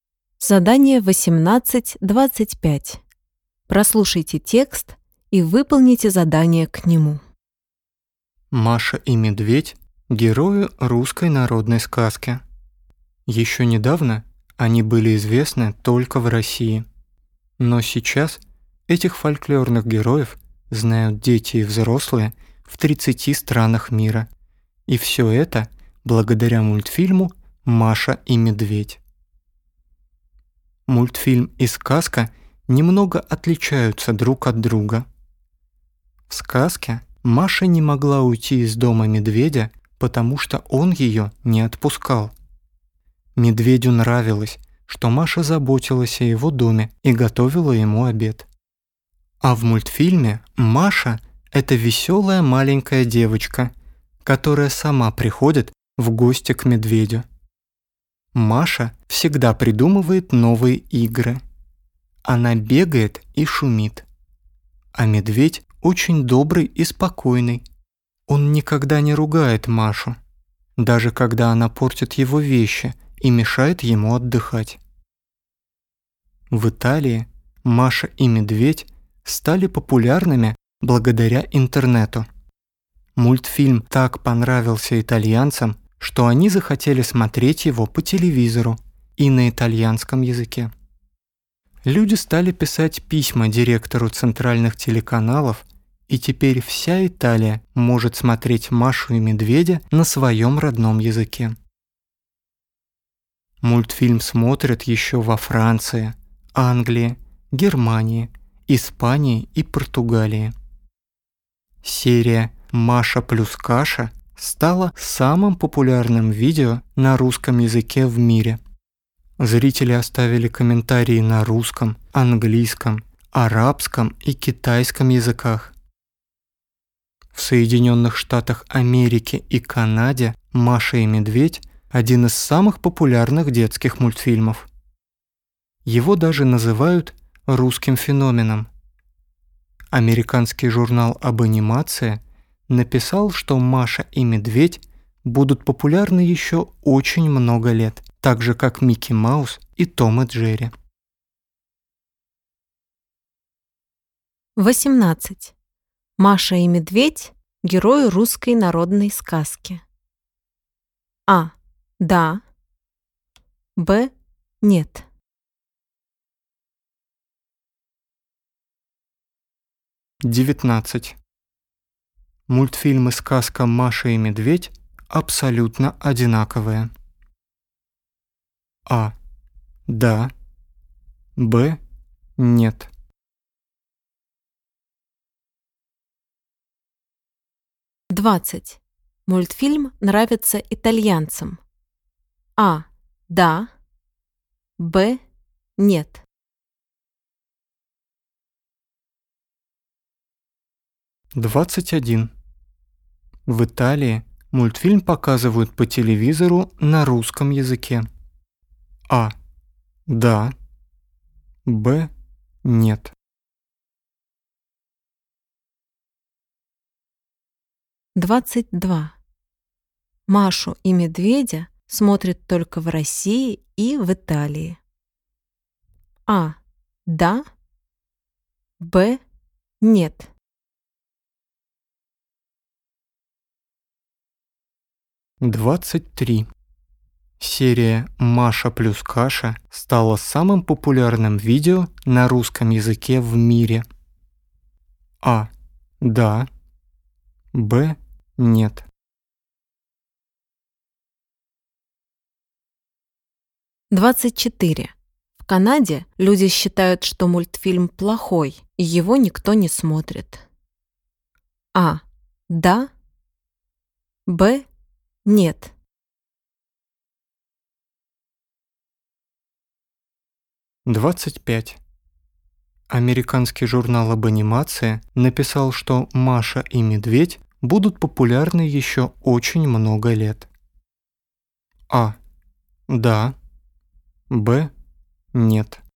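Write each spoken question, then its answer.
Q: «Маша и Медведь» – герои русской народной сказки.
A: А: Да

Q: Мультфильмы «Сказка Маша и Медведь» абсолютно одинаковые.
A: Б: Нет

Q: Мультфильм нравится итальянцам.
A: А: Да

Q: В Италии мультфильм показывают по телевизору на русском языке.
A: Б: Нет

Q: Машу и Медведя смотрят только в России и в Италии.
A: Б: Нет

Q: Серия «Маша плюс каша» стала самым популярным видео на русском языке в мире.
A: А: Да

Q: В Канаде люди считают, что мультфильм плохой, и его никто не смотрит.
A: Б: Нет

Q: Американский журнал об анимации написал, что «Маша и Медведь» будут популярны еще очень много лет.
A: А: Да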